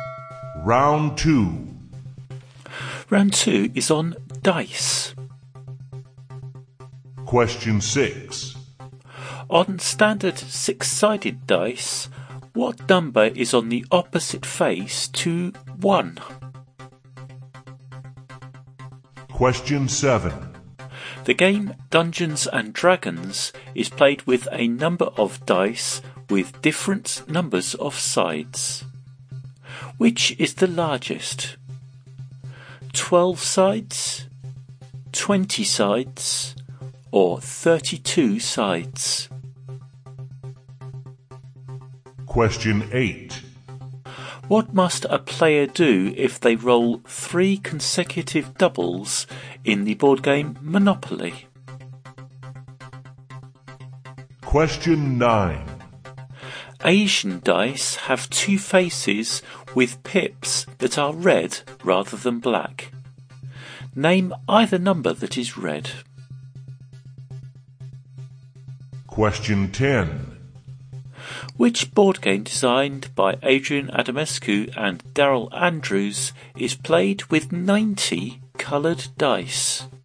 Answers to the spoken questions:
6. the number on the opposite face to one, is six.
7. Number seven, the dice with the largest number of sides in Dungeons & Dragons is the 20-sided die.
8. Number eight, if you roll three consecutive doubles in Monopoly, you must go to jail.
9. Number nine, on Asian dice, the numbers 1 and 4 have red pips, so either one of those would score you the point.
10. And number 10, that board game with 90 coloured dice is Sagrada.